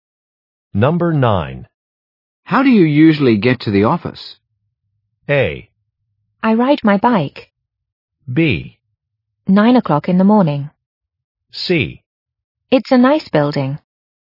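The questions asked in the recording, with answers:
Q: How do you usually get to the office?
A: A: I ride my bike.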